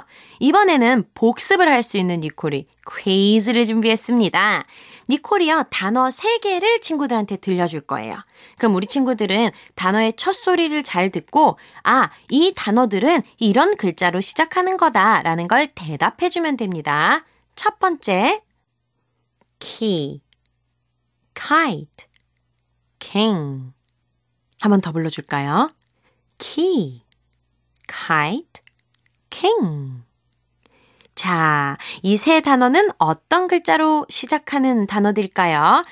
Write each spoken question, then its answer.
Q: 자, 이 세 단어는 어떤 글자로 시작하는 단어들까요?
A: K의 소리로 시작하는 단어들이었지요.